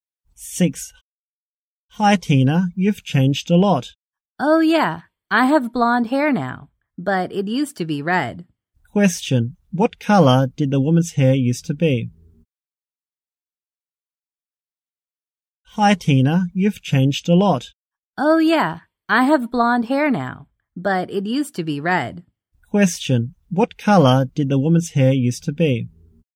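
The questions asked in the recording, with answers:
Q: What color did the woman's hair used to be?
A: Red.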